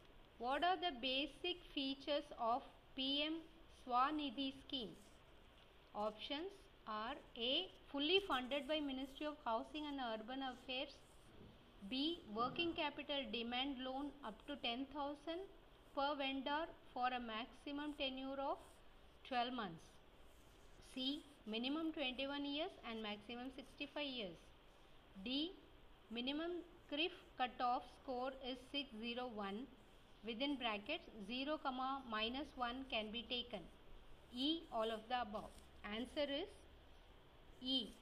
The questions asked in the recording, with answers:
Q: What are the basic features of PM Swanidhi scheme?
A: Answer is E.